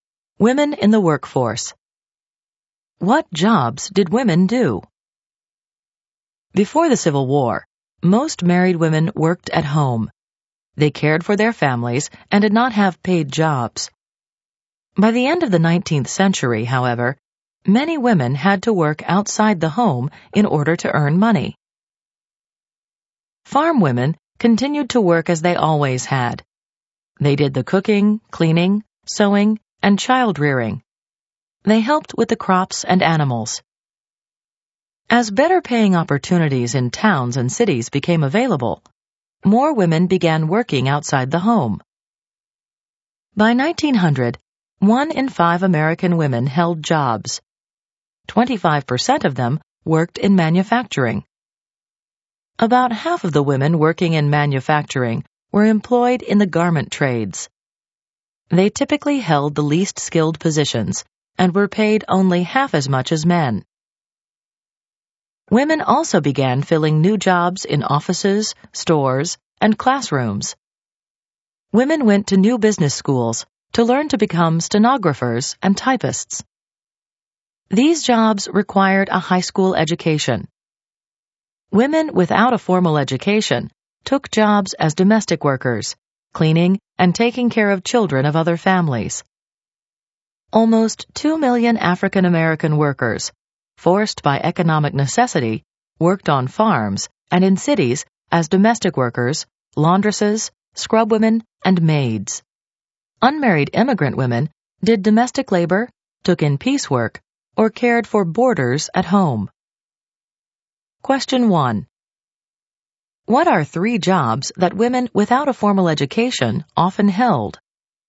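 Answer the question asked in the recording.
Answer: Domestic workers: cleaning, caring for other families' children, laundresses, scrubwomen, maids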